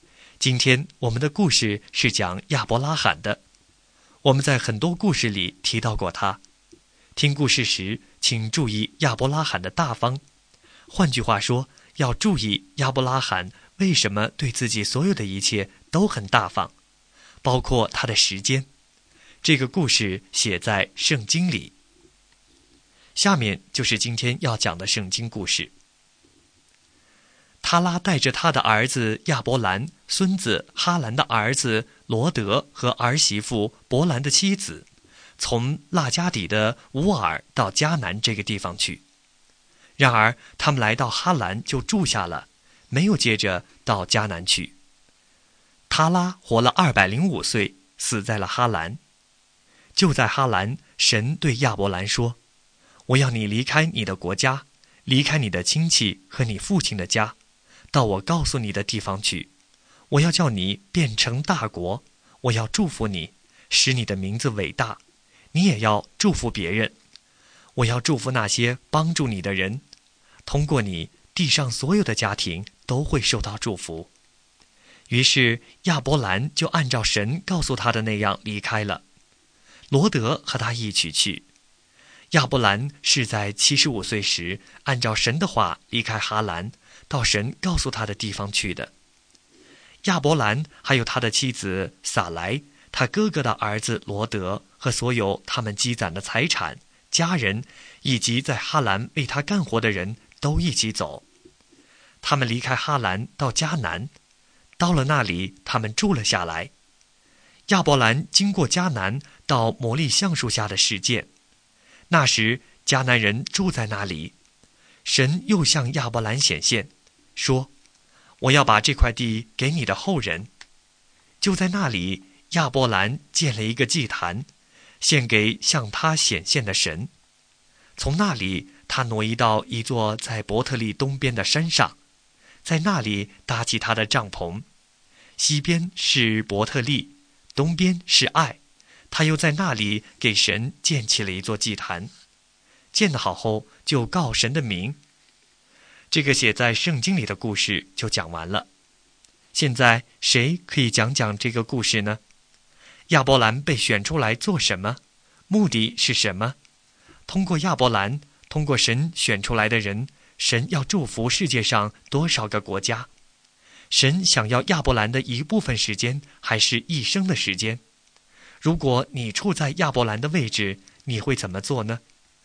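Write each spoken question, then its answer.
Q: 通过亚伯兰,通过神选出来的人,神要祝福世界上多少个国家?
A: 地上所有的家庭(所有国家)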